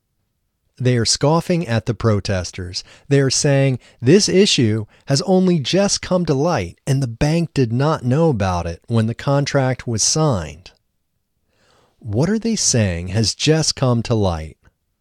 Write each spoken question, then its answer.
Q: What are they saying has just come to light?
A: They are saying this issue has just come to light.